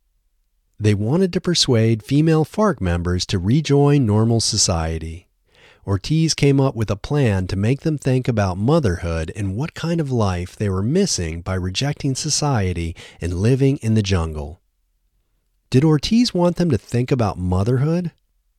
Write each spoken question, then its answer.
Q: Did Ortiz want them to think about motherhood?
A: Yes, he wanted them to think about motherhood.